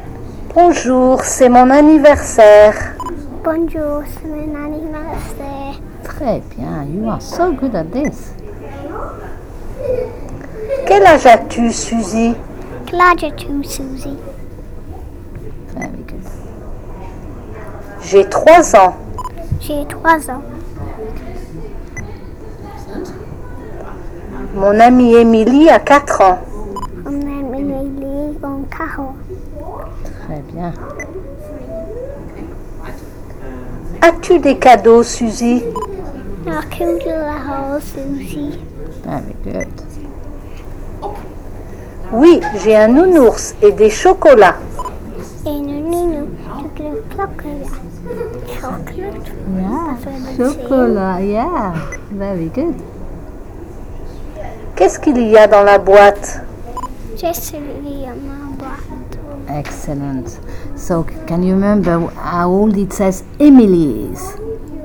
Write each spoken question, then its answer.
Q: So, can you remember how old it says Emily is?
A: Four.